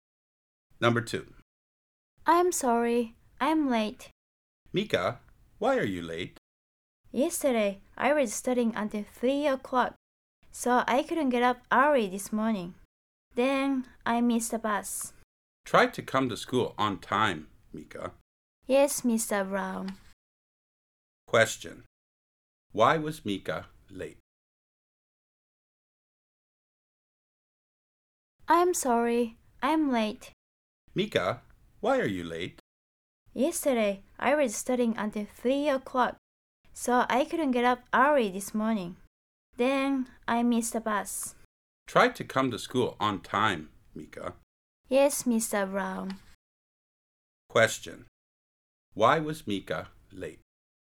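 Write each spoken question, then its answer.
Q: Why was Mika late?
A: She studied until 3 o'clock, couldn't get up early, and missed the bus.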